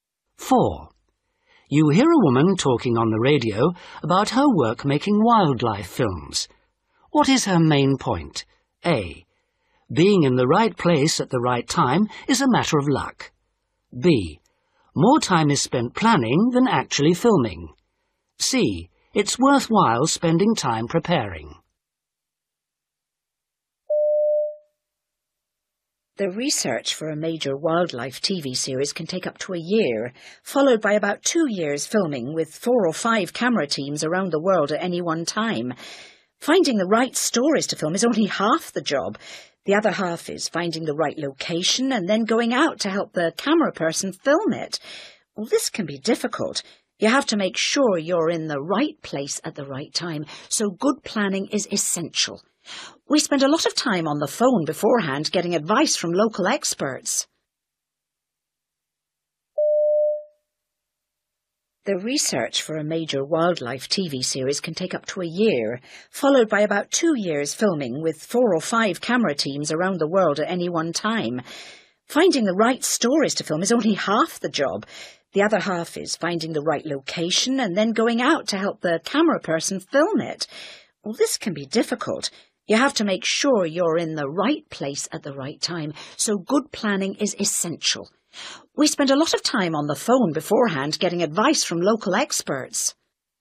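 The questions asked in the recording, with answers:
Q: What is her main point?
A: C: It's worthwhile spending time preparing.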